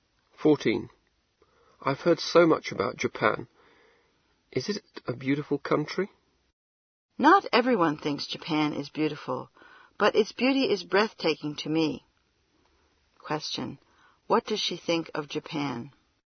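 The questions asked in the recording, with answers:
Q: What does she think of Japan?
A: Its beauty is breathtaking to her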